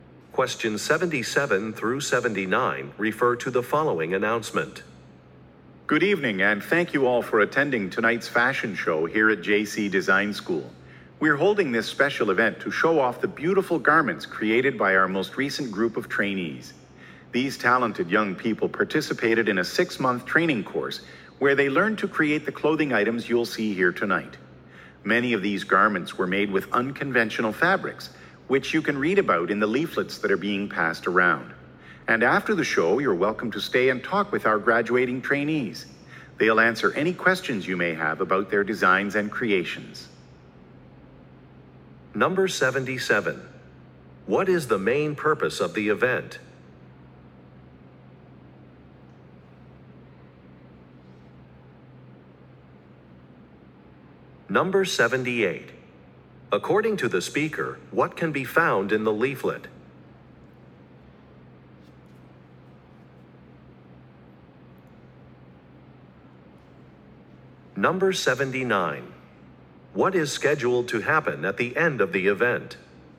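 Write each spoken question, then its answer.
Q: What is the main purpose of the event?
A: To show off garments created by the school's recent trainees (a fashion show)

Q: According to the speaker, what can be found in the leaflet?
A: Information about the unconventional fabrics used in the garments

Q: What is scheduled to happen at the end of the event?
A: Guests can stay and talk with the graduating trainees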